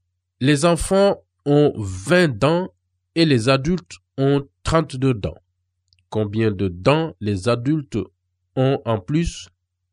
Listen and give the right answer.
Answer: X est égal à 12.